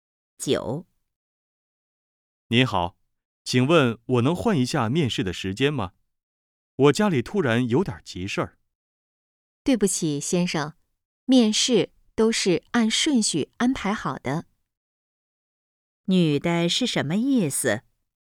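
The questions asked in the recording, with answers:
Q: 女的是什么意思?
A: 不能换面试时间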